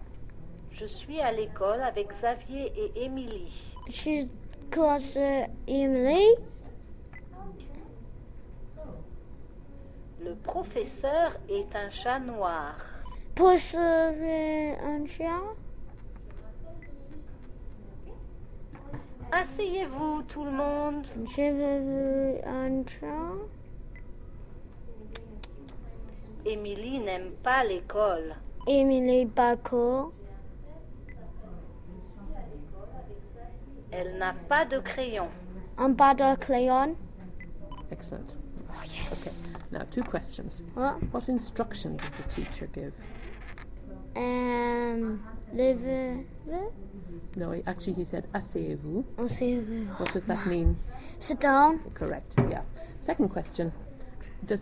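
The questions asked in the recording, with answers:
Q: Does Emily like school?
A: No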